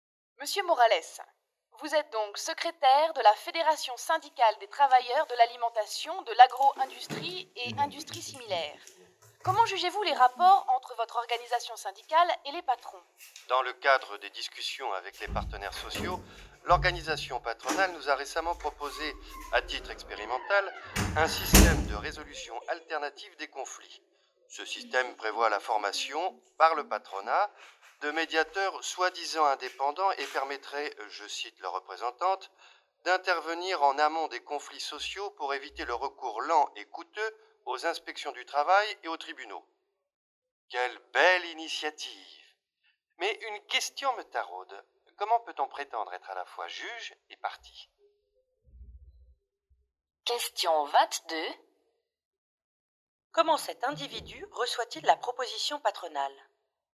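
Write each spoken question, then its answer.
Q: Comment cet individu reçoit-il la proposition patronale ?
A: Avec scepticisme/ironie : il doute de l'indépendance des médiateurs formés par le patronat (juge et partie).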